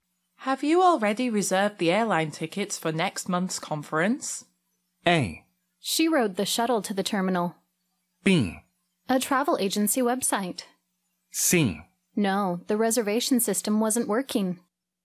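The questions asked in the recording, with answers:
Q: Have you already reserved the airline tickets for next month's conference?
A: C: No, the reservation system wasn't working.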